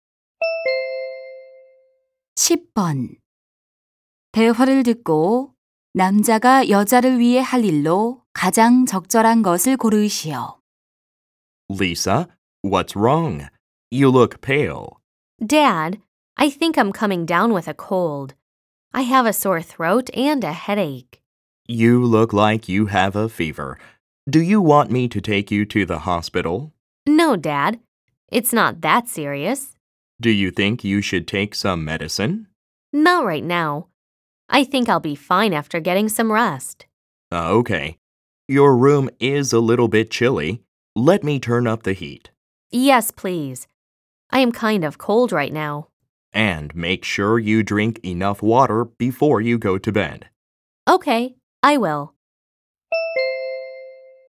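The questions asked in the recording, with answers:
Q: 대화를 듣고 남자가 여자를 위해 할 일로 가장 적절한 것을 고르시오.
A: 난방 온도 올리기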